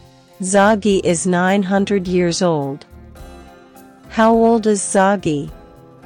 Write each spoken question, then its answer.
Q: How old is Zoggy?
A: 900. He's 900 years old